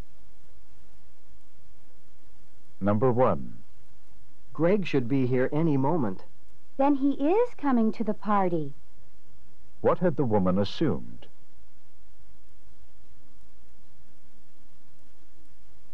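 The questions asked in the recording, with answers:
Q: What had the woman assumed?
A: That Greg wasn't coming to the party.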